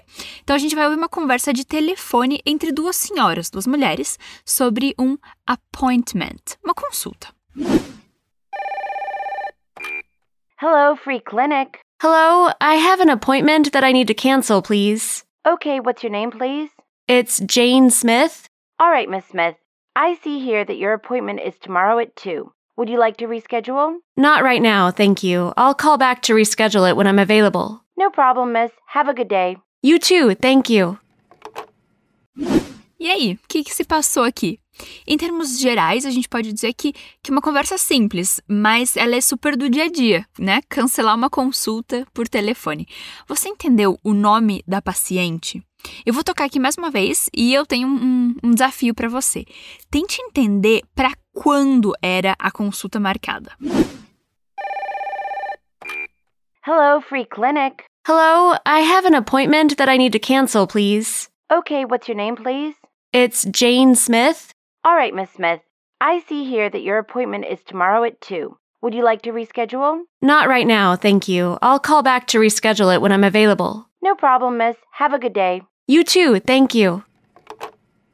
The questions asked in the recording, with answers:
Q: Você entendeu o nome da paciente?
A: nome da paciente é Jane Smith.

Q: Tente entender para quando era a consulta marcada.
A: Isso quer dizer, eu vejo aqui que a sua consulta é amanhã às duas.